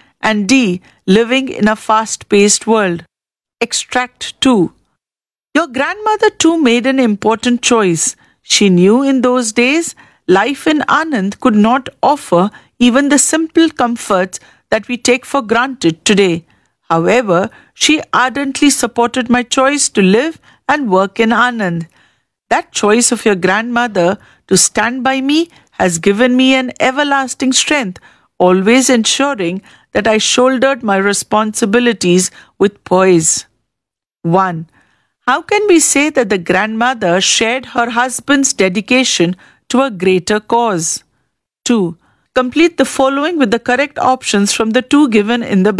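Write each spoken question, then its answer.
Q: How can we say that the grandmother shared her husband's dedication to a greater cause?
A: She supported his choice to live and work in Anand despite its lack of comforts.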